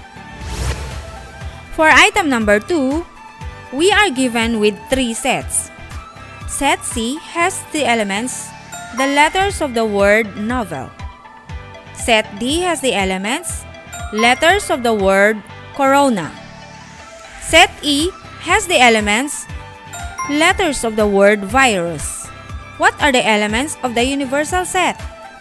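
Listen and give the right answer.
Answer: N, O, V, E, L, C, R, A, I, U, S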